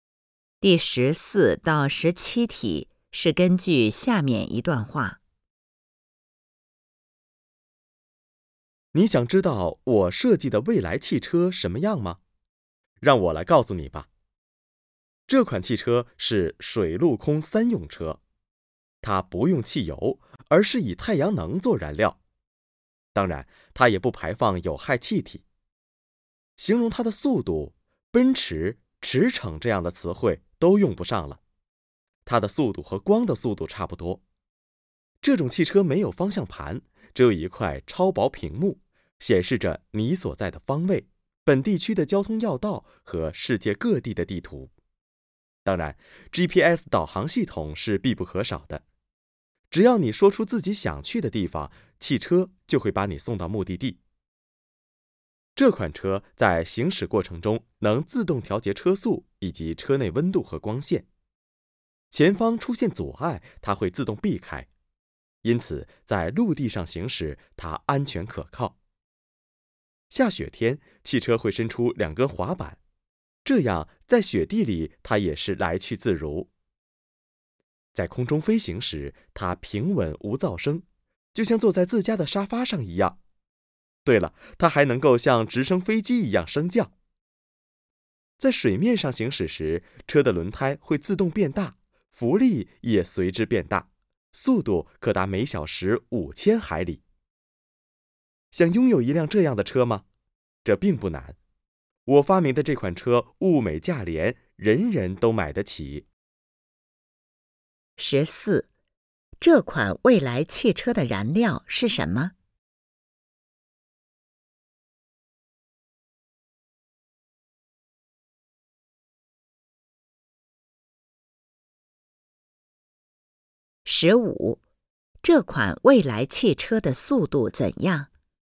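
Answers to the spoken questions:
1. 太阳能
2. 和光的速度差不多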